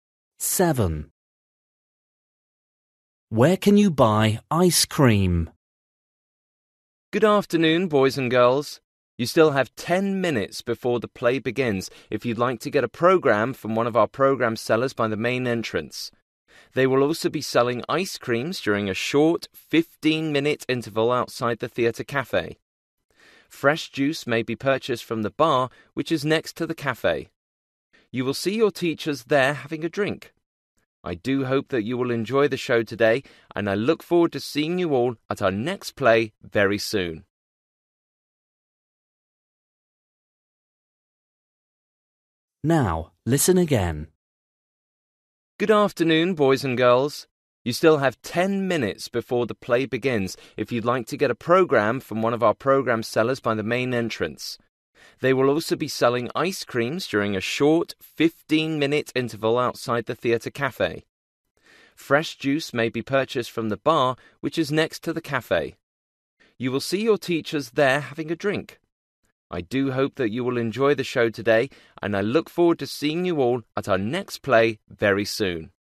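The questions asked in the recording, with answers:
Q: Where can you buy ice cream?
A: outside the theatre cafe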